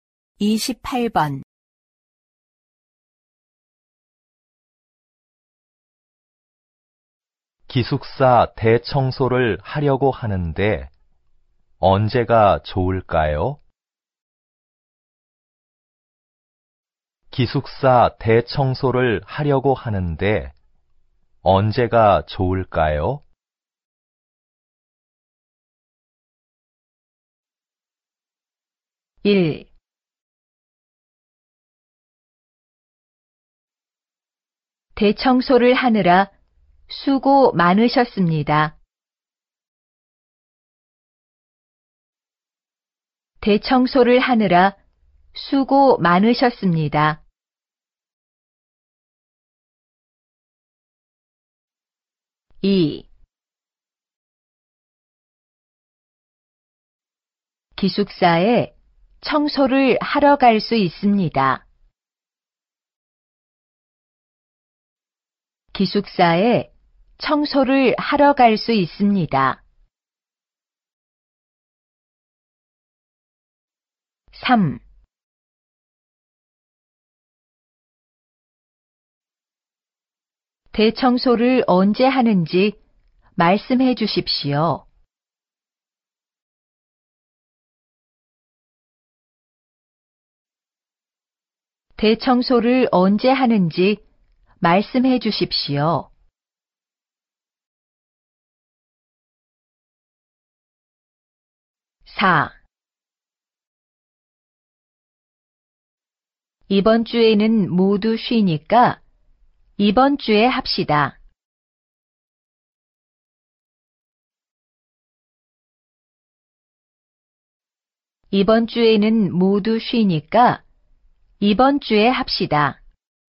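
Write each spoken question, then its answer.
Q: 기숙사 대청소를 하려고 하는데 언제가 좋을까요?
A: 4: 이번 주에는 모두 쉬니까 이번 주에 합시다.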